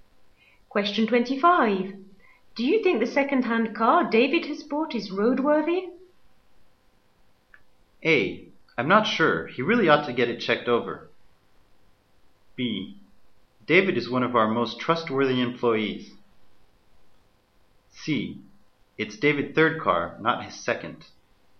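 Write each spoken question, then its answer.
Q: Do you think the second-hand car David has bought is roadworthy?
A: A: I'm not sure. He really ought to get it checked over.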